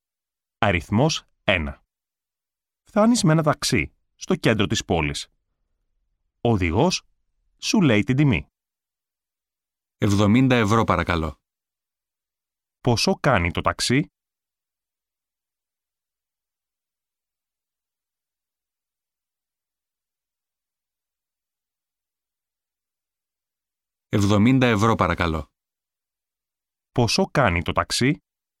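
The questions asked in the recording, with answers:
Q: Πόσο κάνει το ταξί?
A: 70 ευρώ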